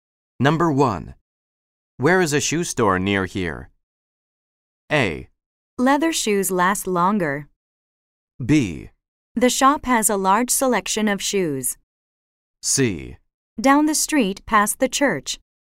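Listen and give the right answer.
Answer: C: Down the street past the church.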